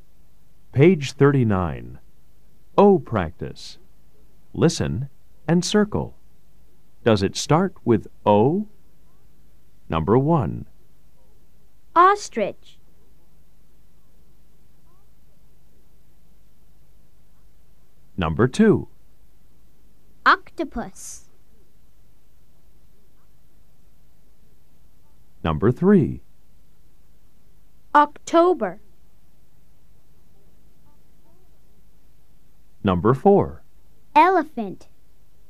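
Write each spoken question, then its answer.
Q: Octopus.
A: Yes

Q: October.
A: Yes

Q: Elephant.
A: No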